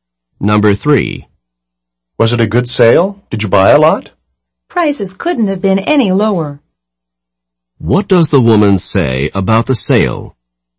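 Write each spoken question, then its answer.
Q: What does the woman say about the sale?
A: Prices were extremely low; it was a very good sale.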